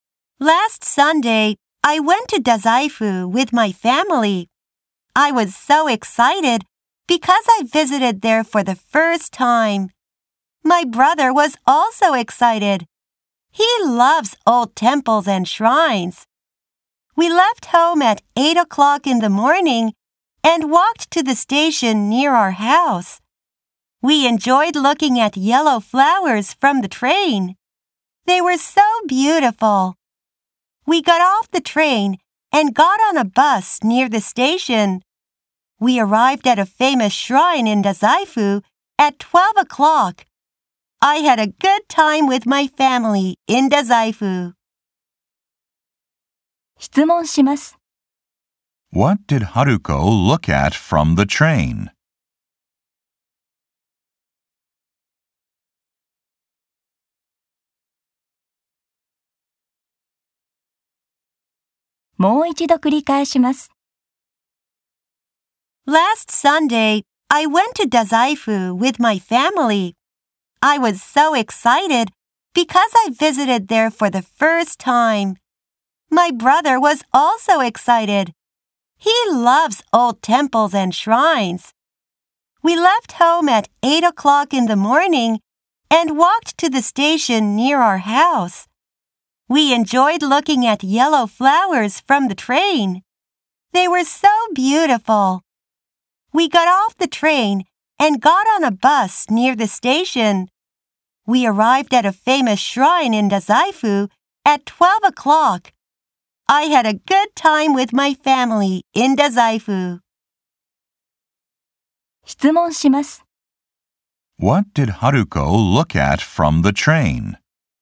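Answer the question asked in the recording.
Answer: Yellow flowers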